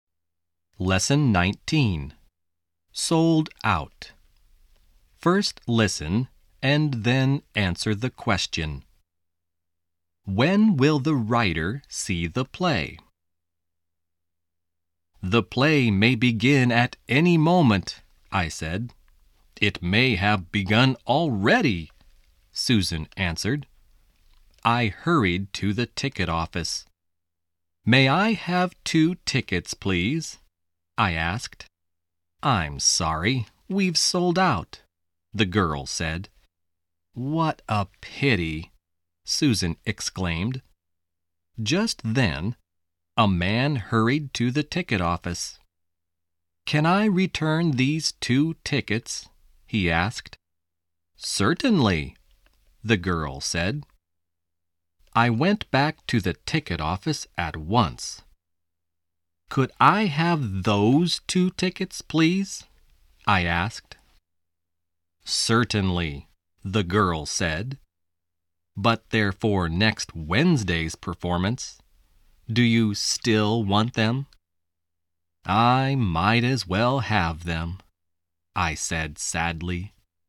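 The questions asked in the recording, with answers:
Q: When will the writer see the play?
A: Next Wednesday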